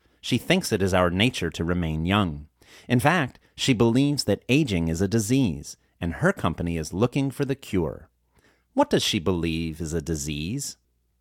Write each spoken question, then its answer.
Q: What does she believe is a disease?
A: She believes aging is a disease.